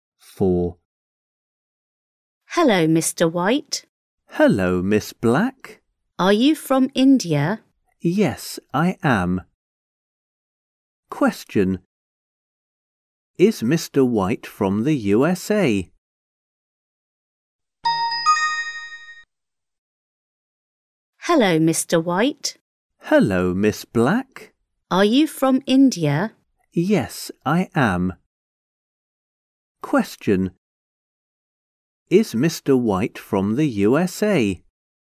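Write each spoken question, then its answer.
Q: Is Mr. White from the USA?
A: No, he isn't. He's from India.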